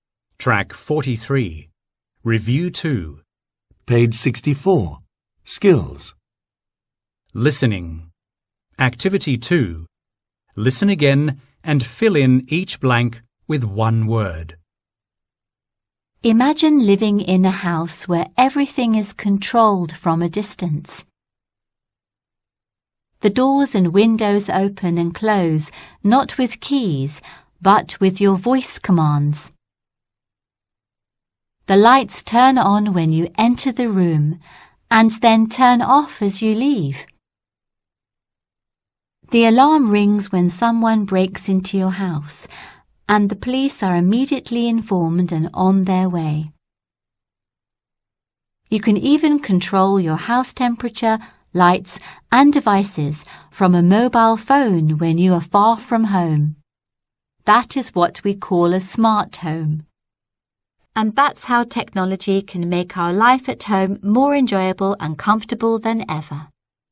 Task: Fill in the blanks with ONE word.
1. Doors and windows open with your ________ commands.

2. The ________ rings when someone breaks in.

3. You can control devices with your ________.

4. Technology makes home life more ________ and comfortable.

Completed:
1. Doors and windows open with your voice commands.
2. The alarm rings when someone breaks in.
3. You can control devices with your mobile (phone).
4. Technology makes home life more enjoyable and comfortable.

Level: lớp 10